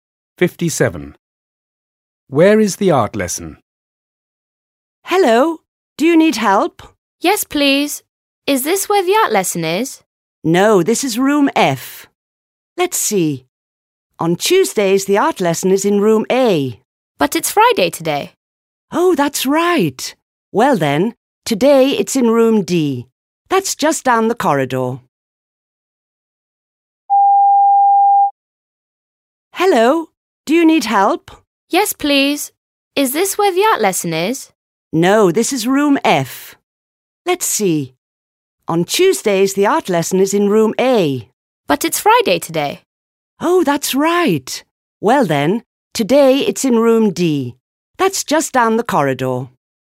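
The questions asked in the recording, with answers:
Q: Where is the art lesson?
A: Room D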